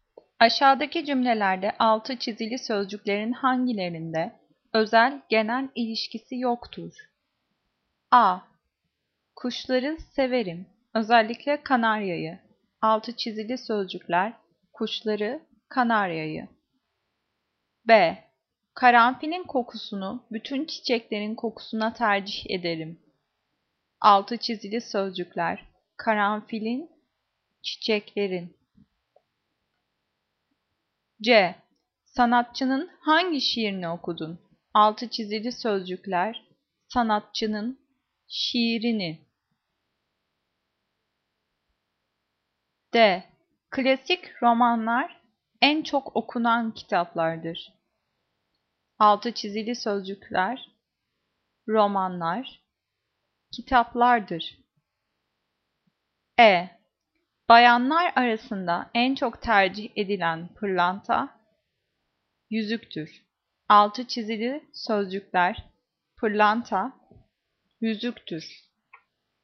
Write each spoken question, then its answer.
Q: Aşağıdaki cümlelerde altı çizili sözcüklerin hangilerinde özel-genel ilişkisi yoktur?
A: Cevap C. Sanatçının hangi şiirini okudun?